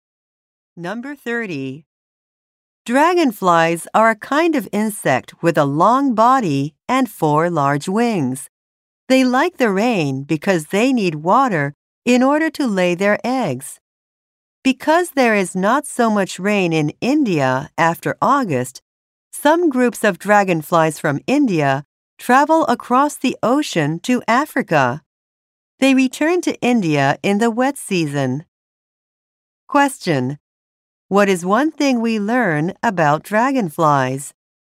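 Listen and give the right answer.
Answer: Some travel from India across the ocean to Africa.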